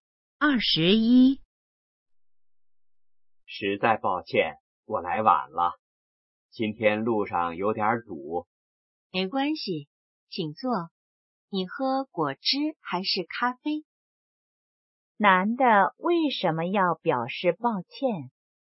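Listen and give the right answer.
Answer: 来晚了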